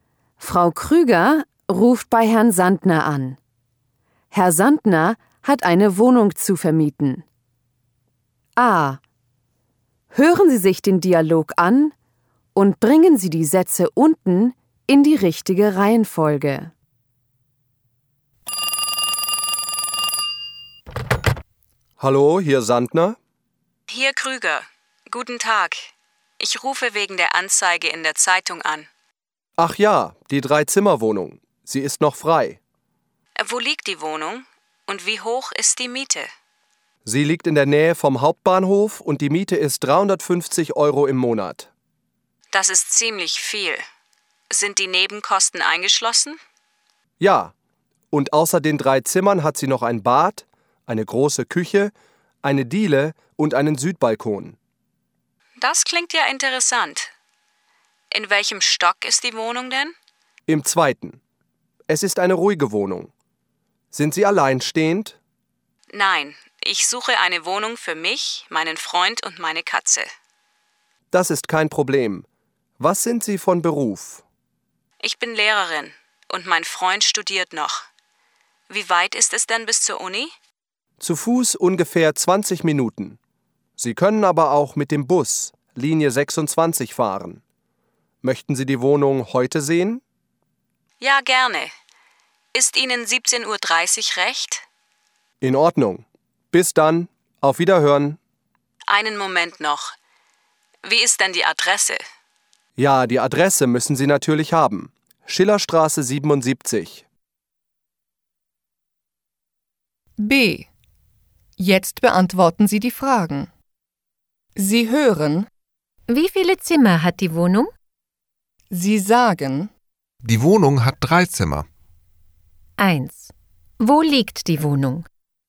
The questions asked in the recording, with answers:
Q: Wo liegt die Wohnung?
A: Sie liegt in der Nähe vom Hauptbahnhof.